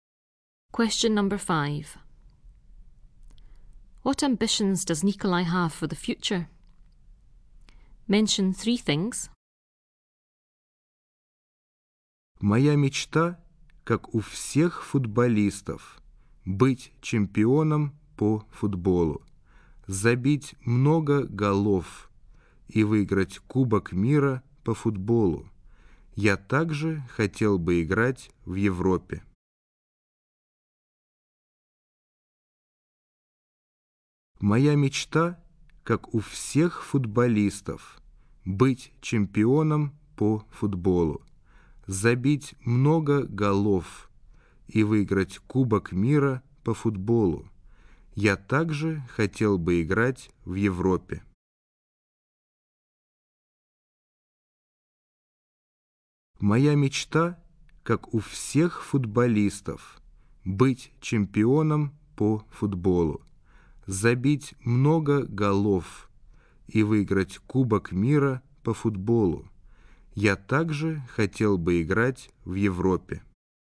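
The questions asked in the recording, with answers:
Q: What ambitions does Nikolai have for the future?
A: Be a football champion, score lots of goals, win the World Cup, play in Europe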